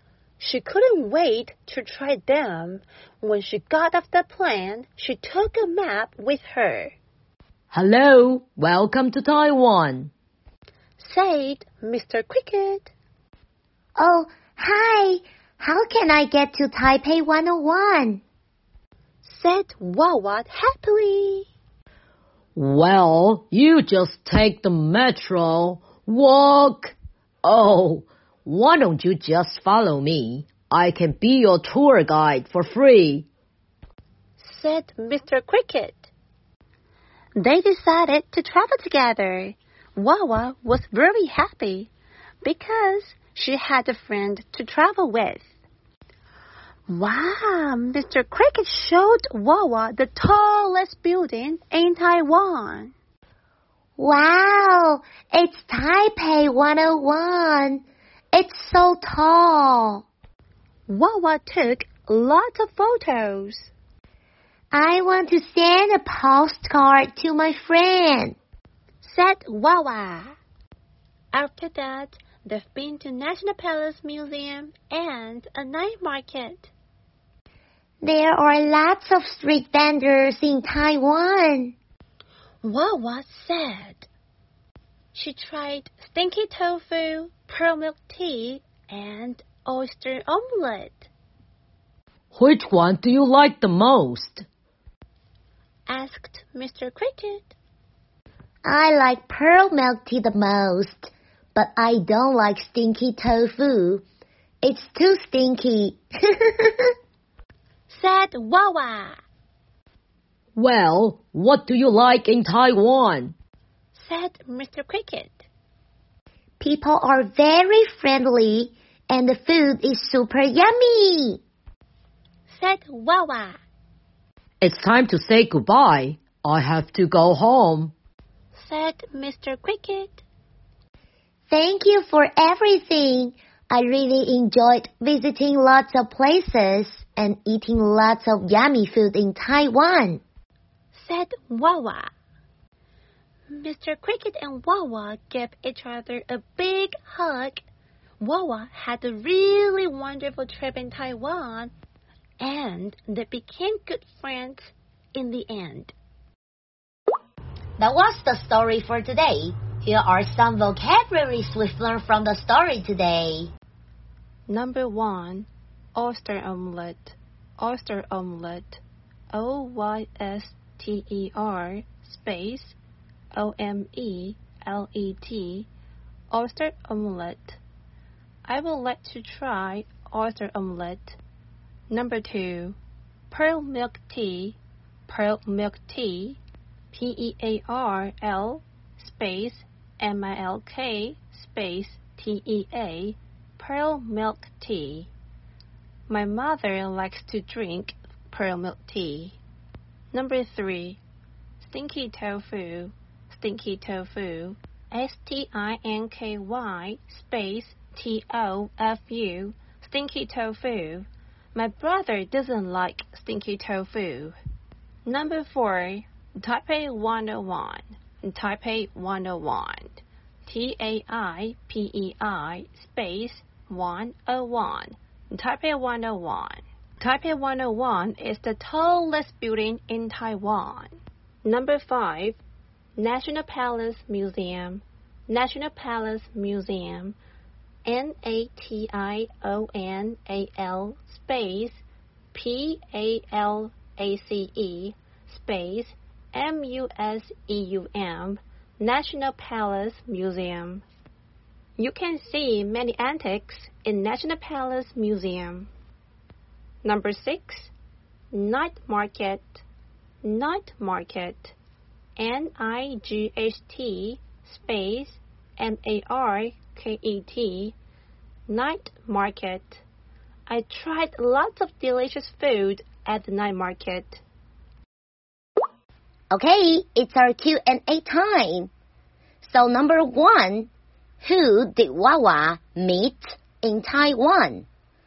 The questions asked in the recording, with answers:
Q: who did Wawa meet in Taiwan?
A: Wawa met Mr. Cricket in Taiwan.